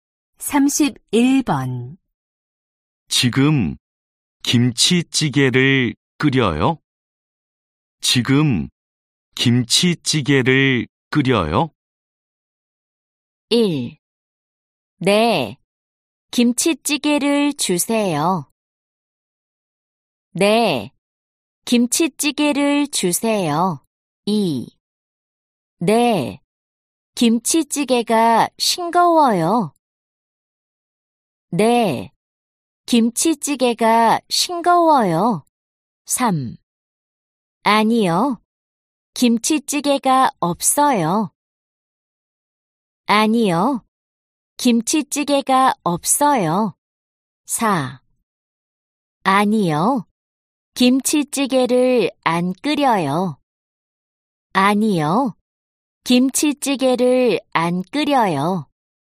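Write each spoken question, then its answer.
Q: 지금 김치찌개를 끓여요?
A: 4: 아니요, 김치찌개를 안 끓여요.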